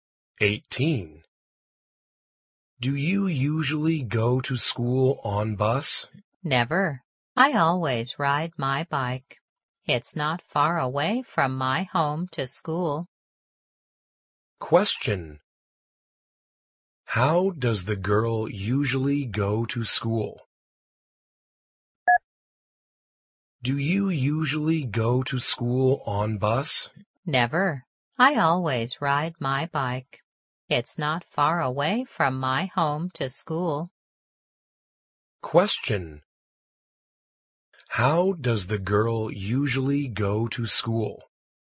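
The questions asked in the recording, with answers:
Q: How does the girl usually go to school?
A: She rides her bike.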